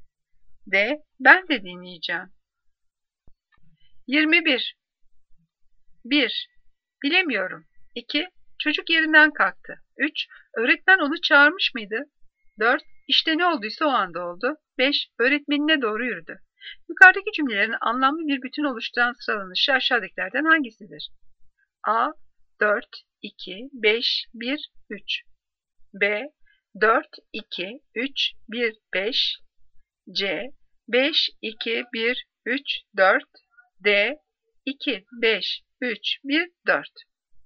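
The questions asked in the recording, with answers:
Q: Yukarıdaki cümlelerin anlamlı bir bütün oluşturan sıralanışı aşağıdakilerden hangisidir?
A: D: 2, 5, 3, 1, 4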